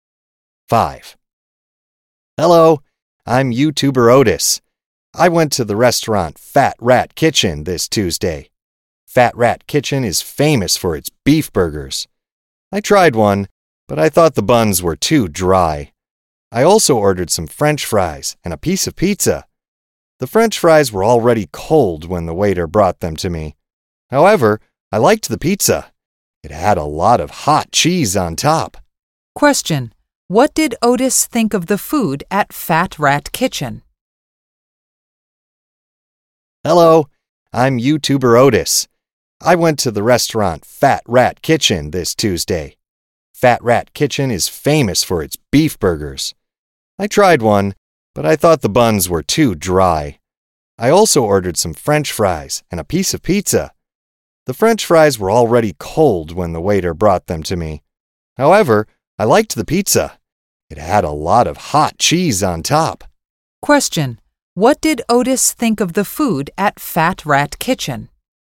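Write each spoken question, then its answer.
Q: What did Otis think of the food at Fat Rat Kitchen?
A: The burger buns were too dry and the fries were cold, but he liked the pizza.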